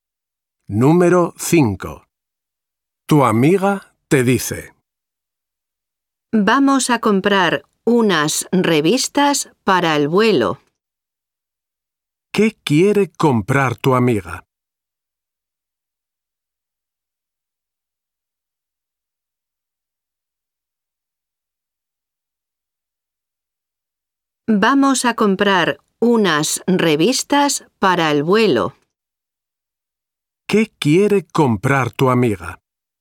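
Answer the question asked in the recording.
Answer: unas revistas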